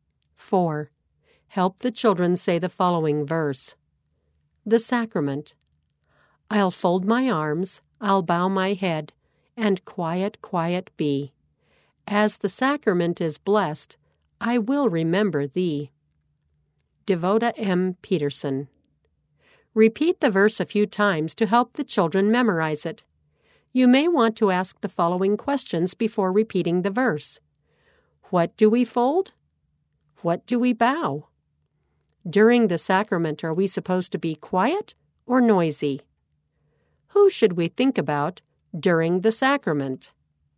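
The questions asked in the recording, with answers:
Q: What do we fold?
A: Our arms

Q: What do we bow?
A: Our head

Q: During the sacrament, are we supposed to be quiet or noisy?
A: Quiet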